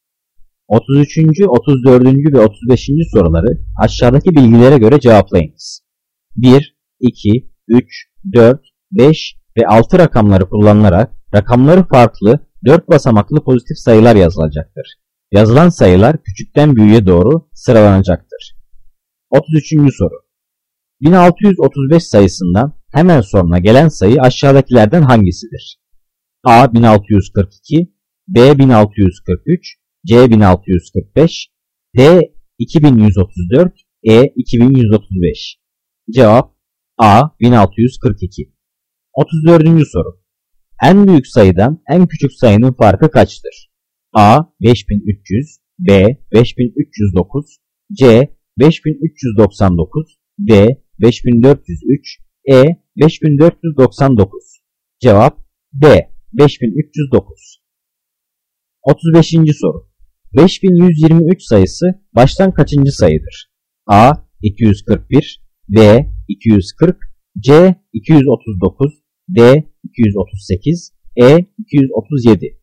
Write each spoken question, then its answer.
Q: 1635 sayısından hemen sonra gelen sayı aşağıdakilerden hangisidir?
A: Cevap A 1642.

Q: En büyük sayıdan en küçük sayının farkı kaçtır?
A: Cevap D 5309.

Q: 5123 sayısı baştan kaçıncı sayıdır?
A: Cevap A 241.